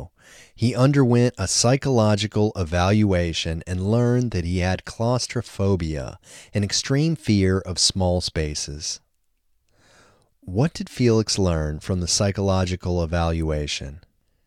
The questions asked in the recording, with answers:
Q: What did Felix learn from the psychological evaluation?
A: He learned that he had claustrophobia, an extreme fear of small spaces.